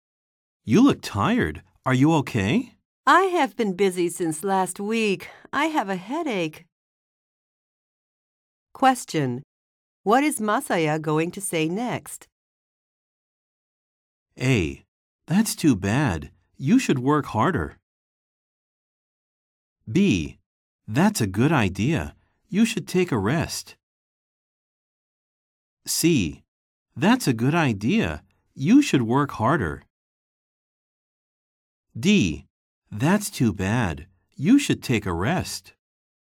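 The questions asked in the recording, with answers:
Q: What is Masaya going to say next?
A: D: That's too bad. You should take a rest.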